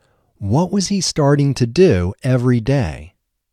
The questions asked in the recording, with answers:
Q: What was he starting to do every day?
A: He was starting to cycle every day.